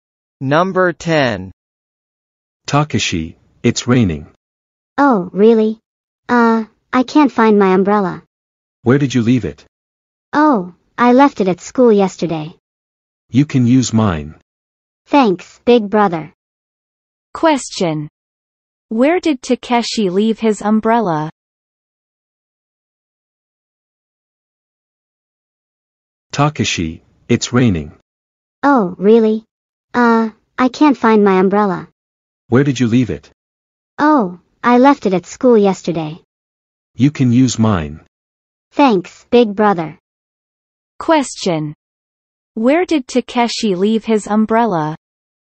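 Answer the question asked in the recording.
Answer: At school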